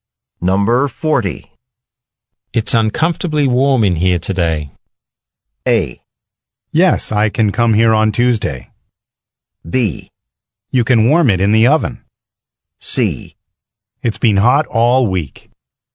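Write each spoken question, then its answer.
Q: It's uncomfortably warm in here today.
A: C: It's been hot all week.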